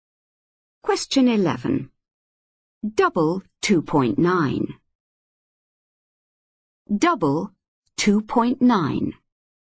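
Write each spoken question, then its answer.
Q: Double 2.9.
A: 5.8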